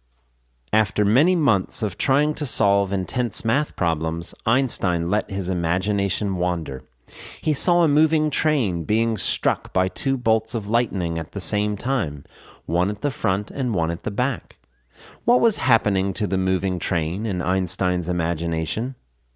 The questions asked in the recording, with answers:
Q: What was happening to the moving train in Einstein's imagination?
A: The moving train was being struck by two bolts of lightning at the same time, one at the front and one at the back.